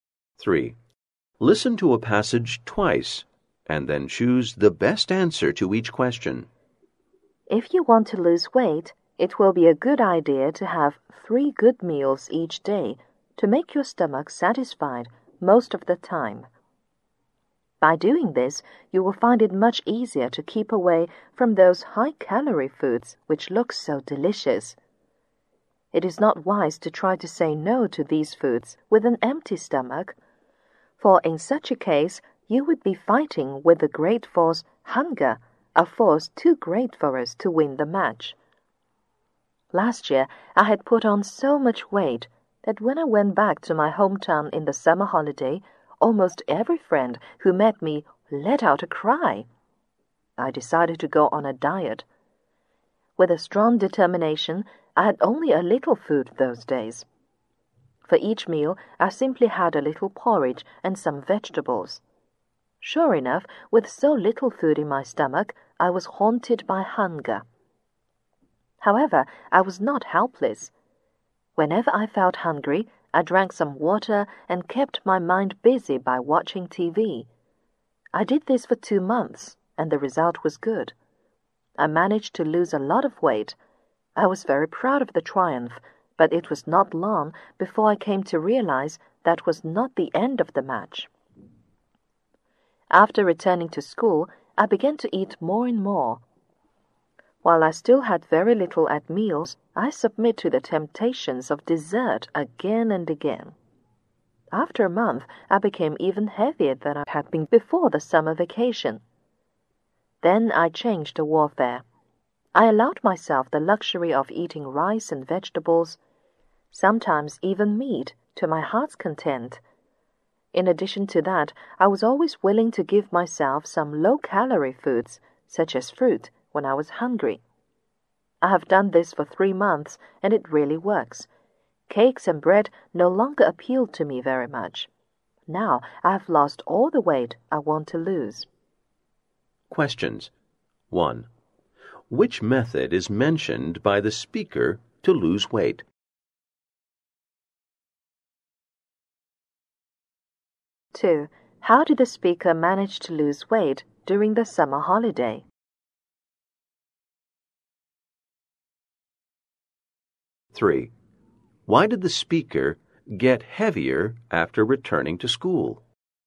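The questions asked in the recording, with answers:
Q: How did the speaker manage to lose weight during the summer holiday?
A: By eating very little (a little porridge and vegetables), and drinking water and watching TV when hungry

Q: Why did the speaker get heavier after returning to school?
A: The speaker ate more and more and kept giving in to desserts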